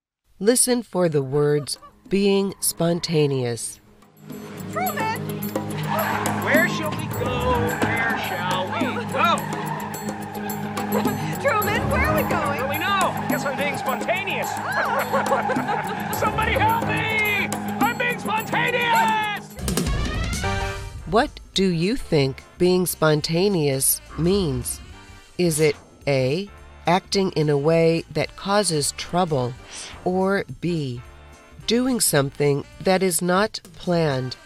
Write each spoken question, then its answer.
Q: What do you think being spontaneous means? Is it A, acting in a way that causes trouble, or B, doing something that is not planned?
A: The answer is B. Being spontaneous is doing something that is not planned.